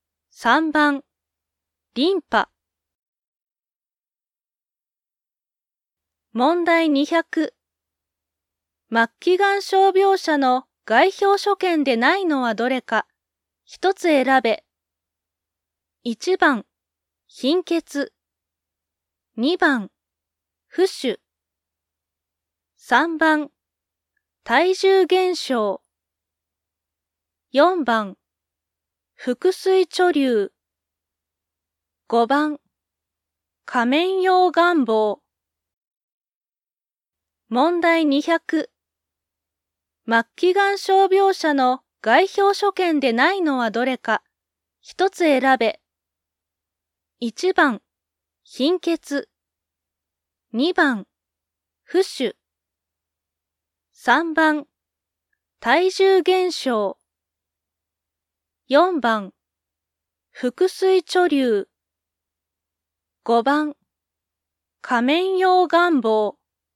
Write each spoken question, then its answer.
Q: 末期がん傷病者の外表所見でないのはどれか、一つ選べ。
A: 5番、仮面用願望。